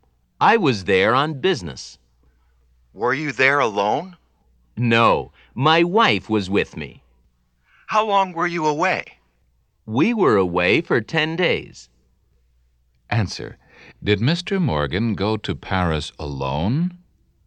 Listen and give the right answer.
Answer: No, he didn't.